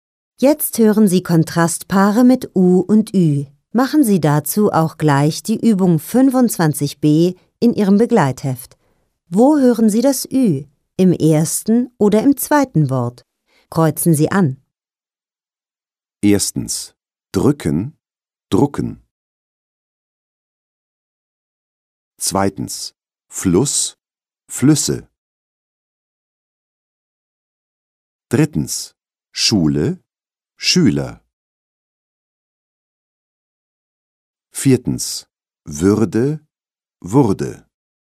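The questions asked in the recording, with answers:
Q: Erstens, drücken, drucken.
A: im ersten Wort: drücken

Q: Zweitens, Fluss, Flüsse.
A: im zweiten Wort: Flüsse

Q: Drittens, Schule, Schüler.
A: im zweiten Wort: Schüler

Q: Viertens, Würde, Wurde.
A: im ersten Wort: Würde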